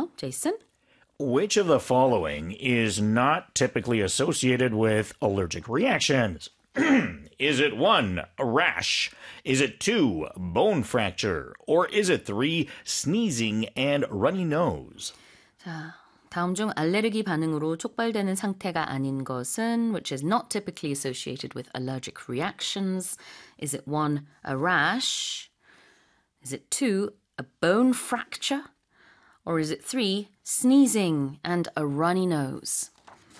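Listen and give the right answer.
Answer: 2: bone fracture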